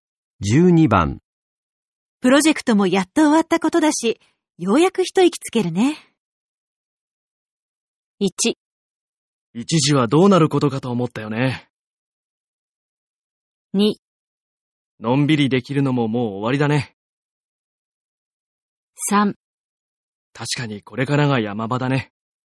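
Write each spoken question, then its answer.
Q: プロジェクトもやっと終わったことだし、ようやく一息つけるね。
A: 1: 一時はどうなることかと思ったよね。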